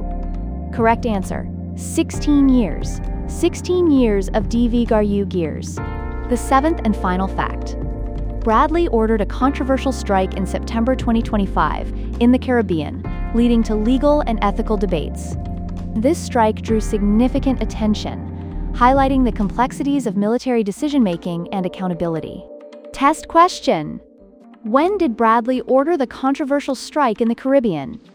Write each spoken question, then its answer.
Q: When did Bradley order the controversial strike in the Caribbean?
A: Correct answer, September 2025.